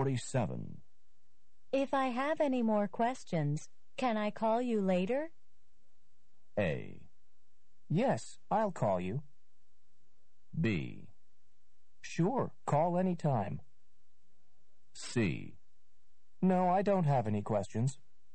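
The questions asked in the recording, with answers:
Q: If I have any more questions, can I call you later?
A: B: Sure, call anytime.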